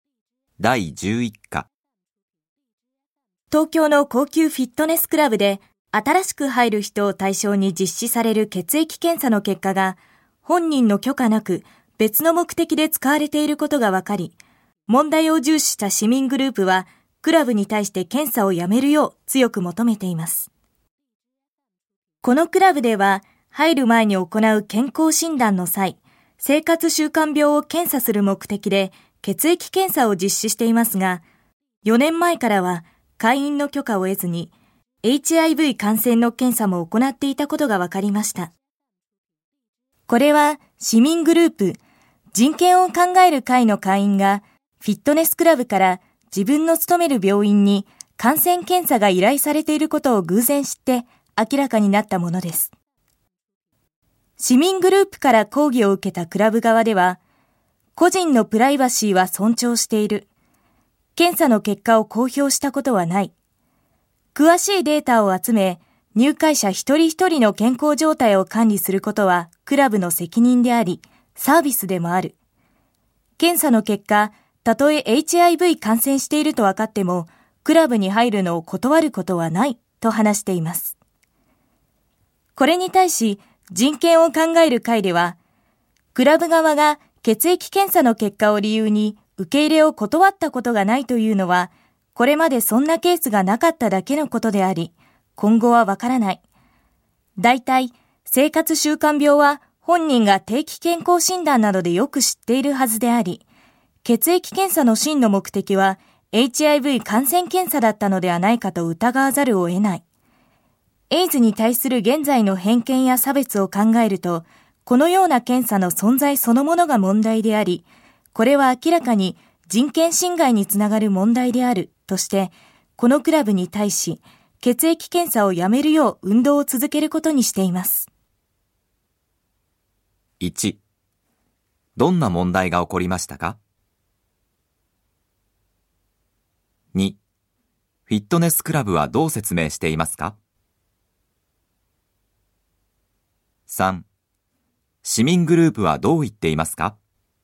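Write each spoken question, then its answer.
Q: どんな問題が起こりましたか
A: フィットネスクラブが入会時の血液検査で本人の許可なくHIV感染検査も行っていた

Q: フィットネスクラブはどう説明していますか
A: プライバシーは尊重し結果を公表したことはない、健康管理はクラブの責任でありサービスで、感染していても入会を断らない

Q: 市民グループはどう言っていますか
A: 本当の目的はHIV検査ではないかと疑われ、人権侵害につながるので検査をやめるべきだ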